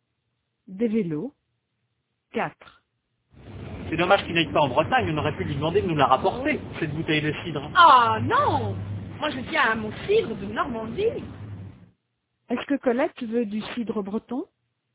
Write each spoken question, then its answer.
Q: Est-ce que Colette veut du cidre breton?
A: Non, elle veut du cidre de Normandie.